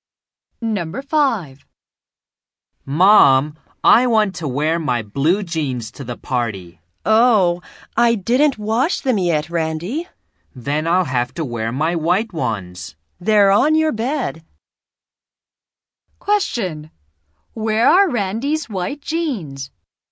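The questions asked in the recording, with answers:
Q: Where are Randy's white jeans?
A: On his bed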